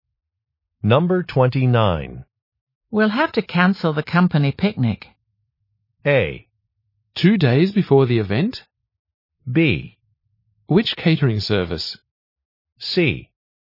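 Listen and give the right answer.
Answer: A: 2 days before the event?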